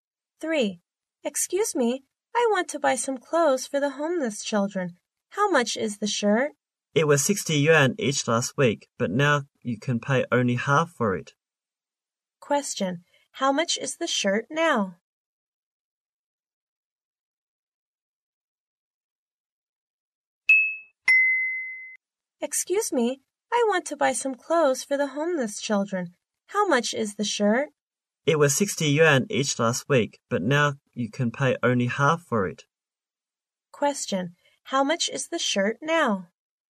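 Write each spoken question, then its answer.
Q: How much is the shirt now?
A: 30 yuan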